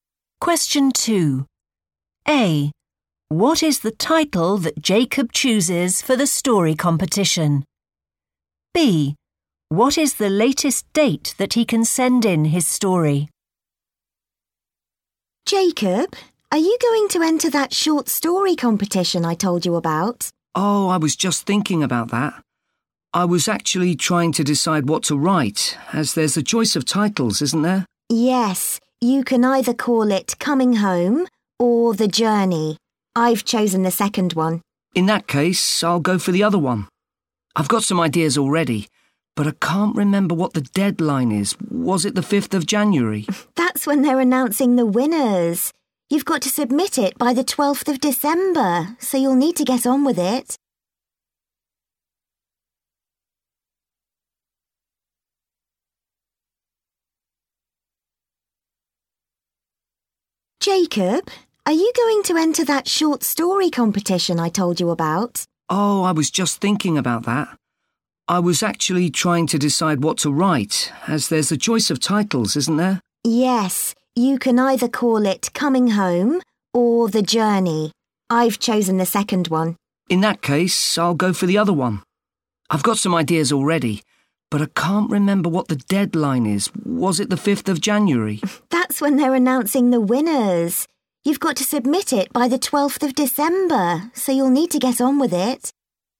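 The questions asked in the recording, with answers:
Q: What is the title that Jacob chooses for the story competition?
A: Coming Home

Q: What is the latest date that he can send in his story?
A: 12th December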